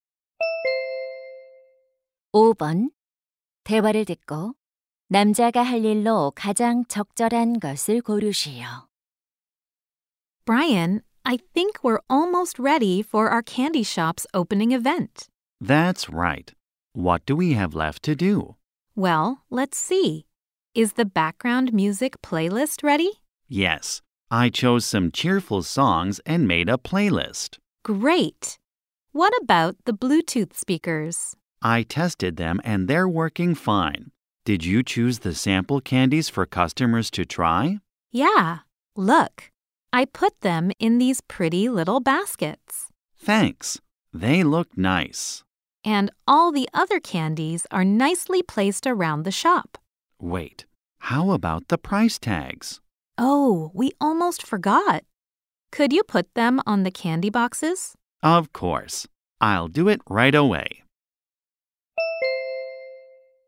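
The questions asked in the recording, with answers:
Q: 대화를 듣고 남자가 할 일로 가장 적절한 것을 고르시오.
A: 사탕 상자에 가격표 붙이기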